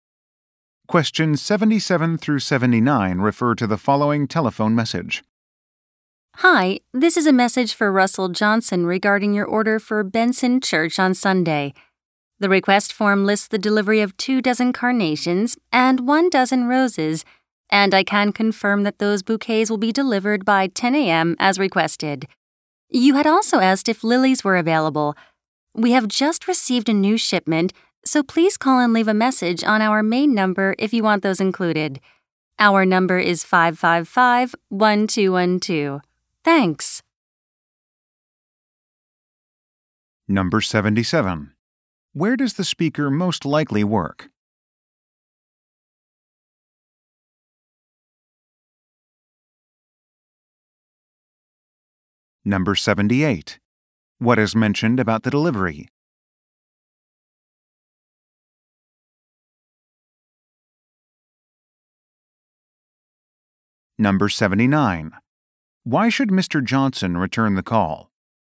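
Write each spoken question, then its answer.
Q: Where does the speaker most likely work?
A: At a flower shop

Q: What is mentioned about the delivery?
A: It will arrive by 10 a.m.

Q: Why should Mr.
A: To have lilies included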